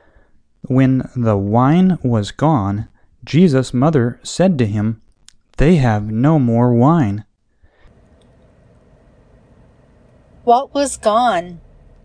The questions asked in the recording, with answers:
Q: What was gone?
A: The wine was gone.